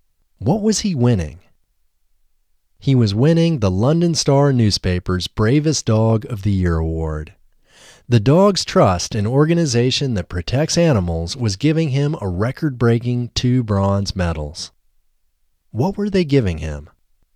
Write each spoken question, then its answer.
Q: What were they giving him?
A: They were giving him a record-breaking 2 bronze medals.